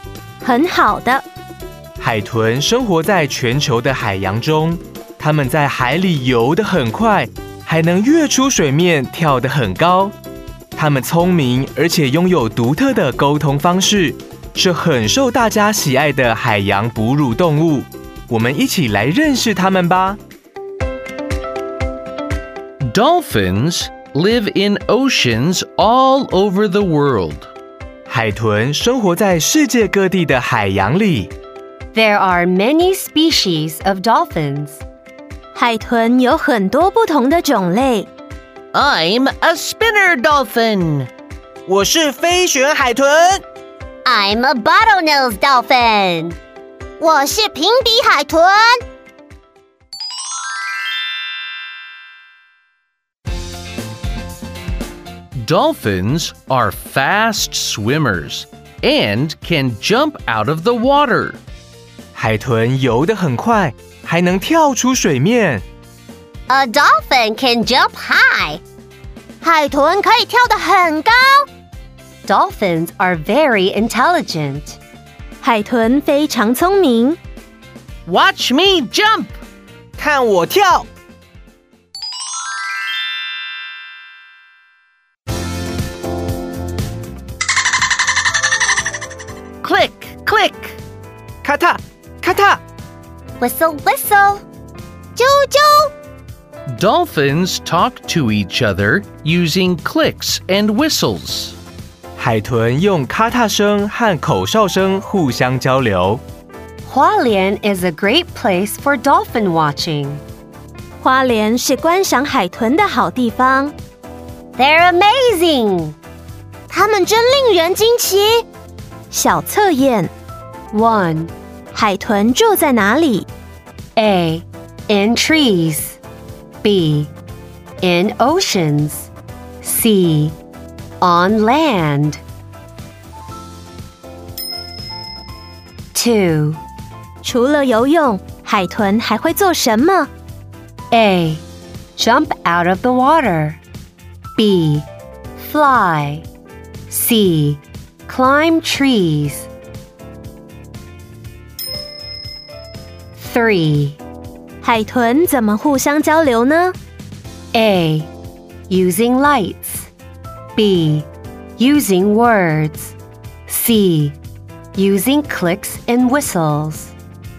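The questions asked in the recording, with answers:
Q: 海豚住在哪里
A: B: In oceans

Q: 除了游泳海豚还会做什么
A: A: Jump out of the water

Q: 海豚怎么互相交流呢?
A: C: Using clicks and whistles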